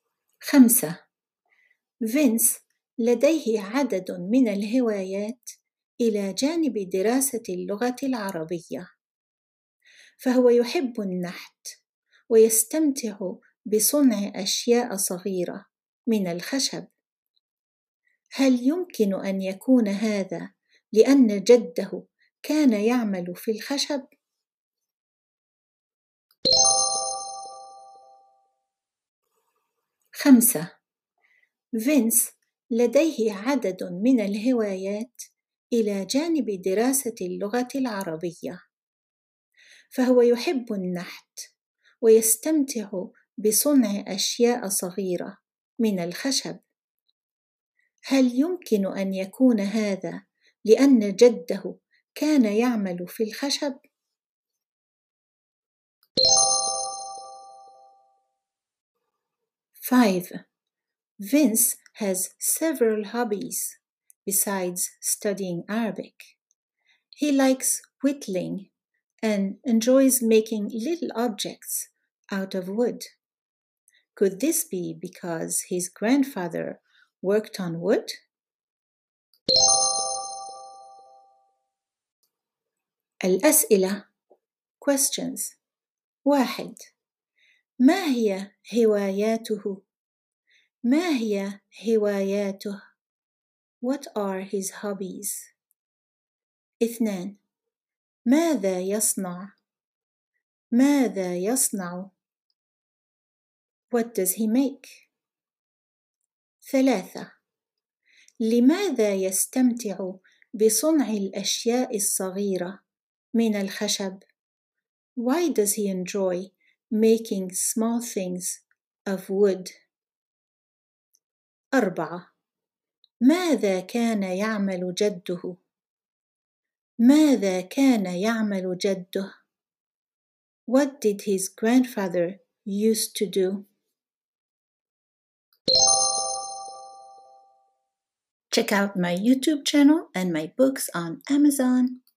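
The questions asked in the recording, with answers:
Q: ما هي هواياته؟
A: النحت ودراسة اللغة العربية

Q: ماذا يصنع؟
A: أشياء صغيرة من الخشب

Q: لماذا يستمتع بصنع الأشياء الصغيرة من الخشب؟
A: ربما لأن جده كان يعمل في الخشب

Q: ماذا كان يعمل جده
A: كان يعمل في الخشب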